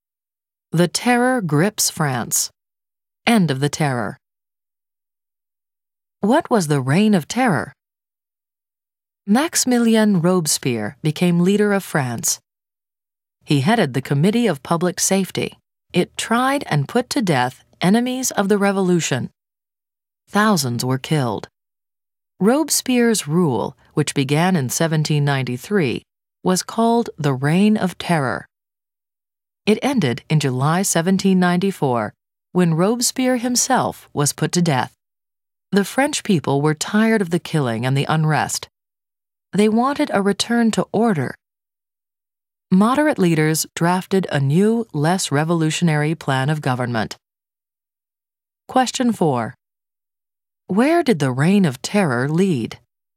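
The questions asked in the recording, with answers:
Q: Where did the Reign of Terror lead?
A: To Robespierre's execution and a new, less revolutionary plan of government by moderate leaders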